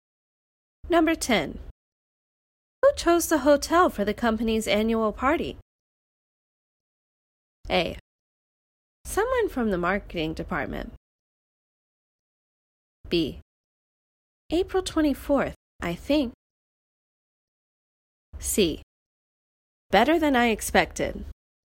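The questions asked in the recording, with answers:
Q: Who chose the hotel for the company's annual party?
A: A: Someone from the marketing department.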